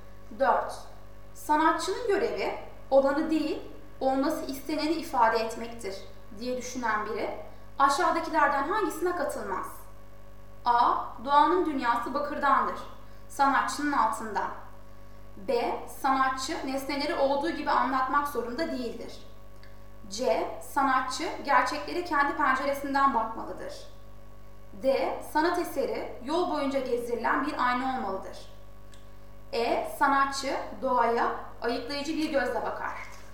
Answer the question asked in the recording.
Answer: Doğru yanıt D.